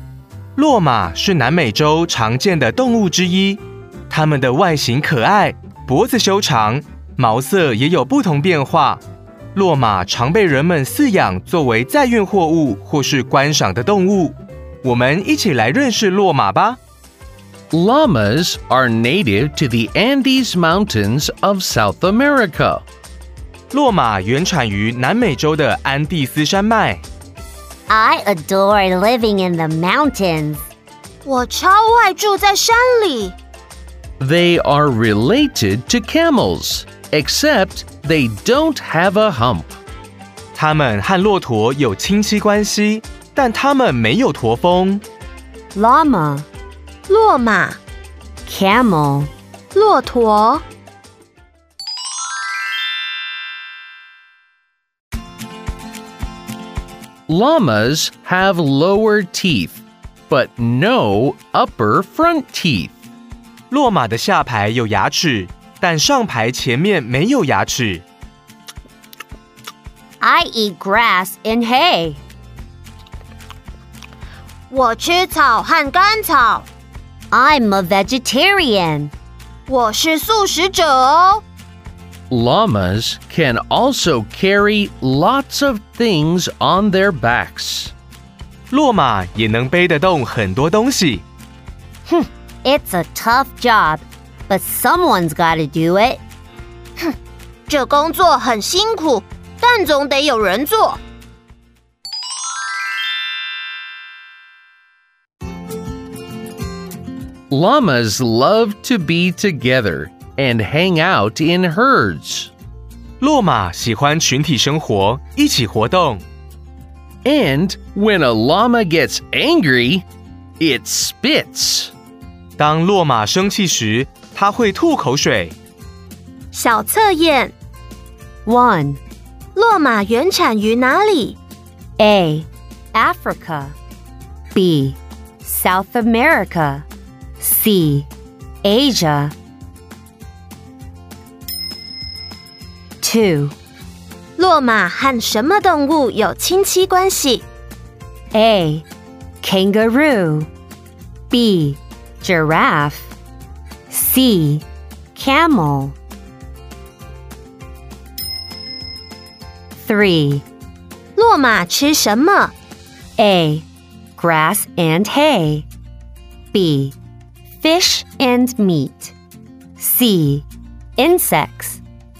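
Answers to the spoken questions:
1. B: South America
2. C: Camel
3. A: Grass and hay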